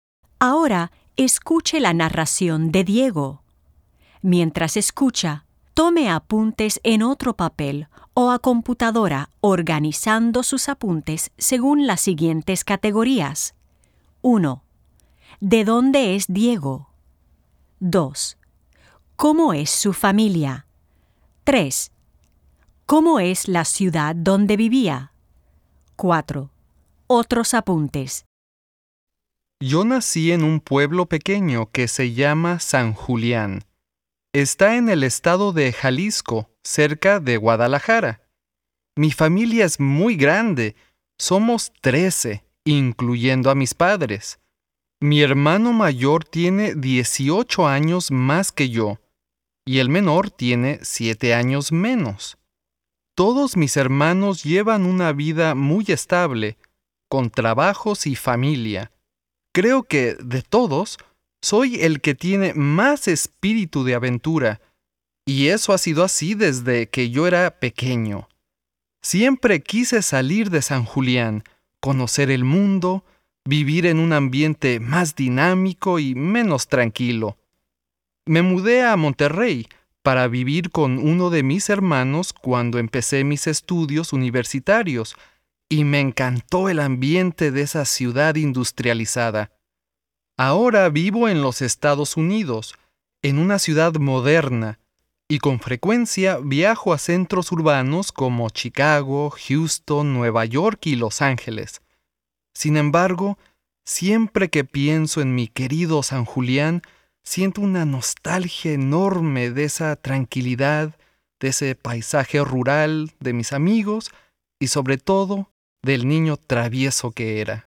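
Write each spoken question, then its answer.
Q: ¿De dónde es Diego?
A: De San Julián, un pueblo pequeño en Jalisco, cerca de Guadalajara

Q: ¿Cómo es su familia?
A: Muy grande: son 13, incluyendo a sus padres

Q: ¿Cómo es la ciudad donde vivía?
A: Un pueblo pequeño, tranquilo y rural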